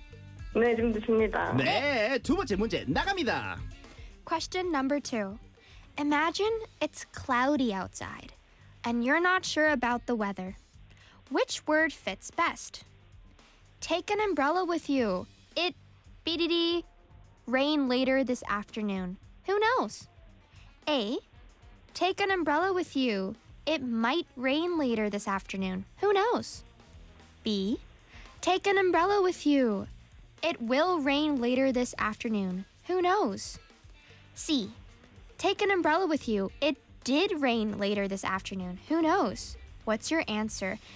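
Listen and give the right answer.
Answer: A: It might rain later this afternoon.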